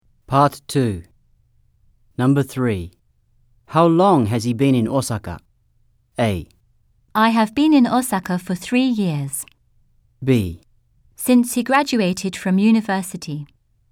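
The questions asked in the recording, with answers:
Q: How long has he been in Osaka?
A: B: Since he graduated from university.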